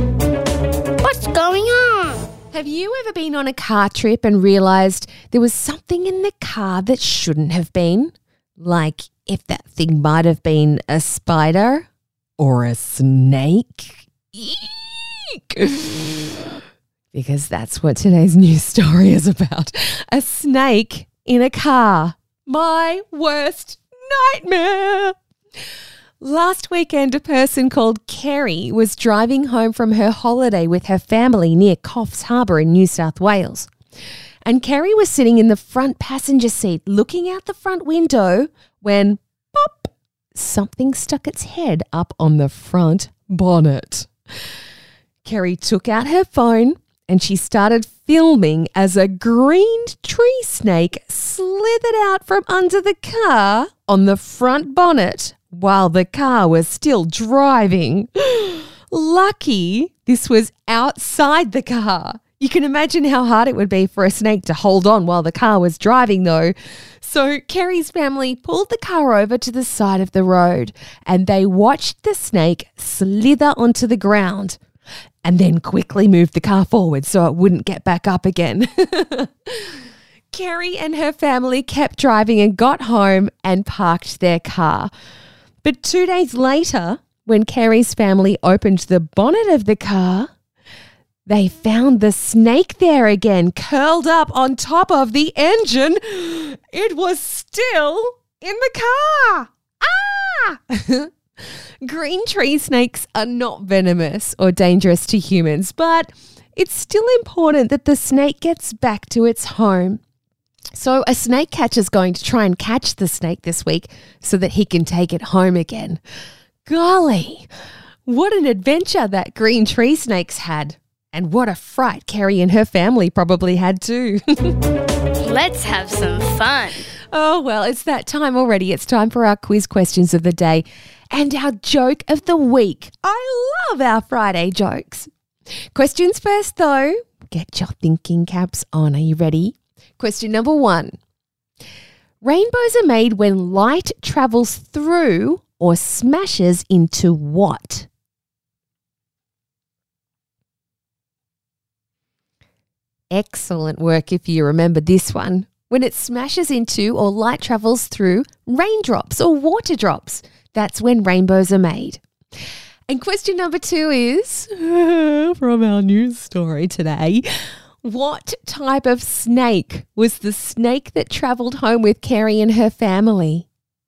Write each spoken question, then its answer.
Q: What type of snake was the snake that travelled home with Kerry and her family?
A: Yes, it's a non-venomous snake. It's called a green tree snake.